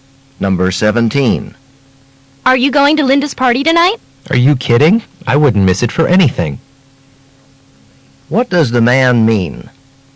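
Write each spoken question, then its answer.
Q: What does the man mean?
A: He will definitely go to the party.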